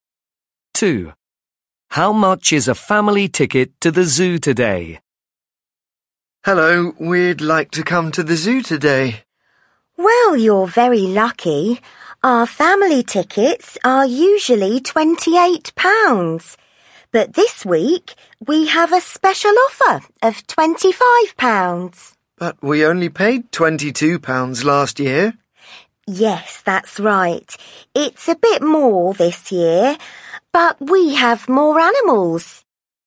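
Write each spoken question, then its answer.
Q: How much is a family ticket to the zoo today?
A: £25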